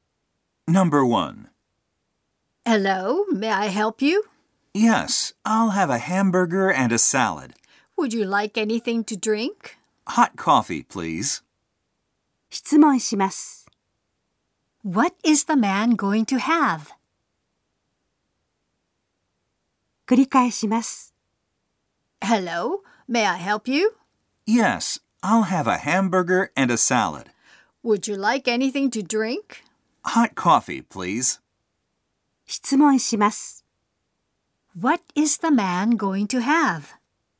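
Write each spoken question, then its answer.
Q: What is the man going to have?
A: A hamburger, a salad and hot coffee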